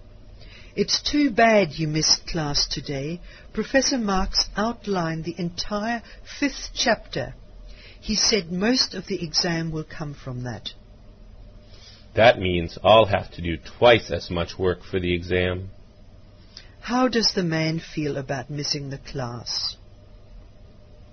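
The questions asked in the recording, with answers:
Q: How does the man feel about missing the class?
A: Unhappy, because he'll have to do twice as much work for the exam.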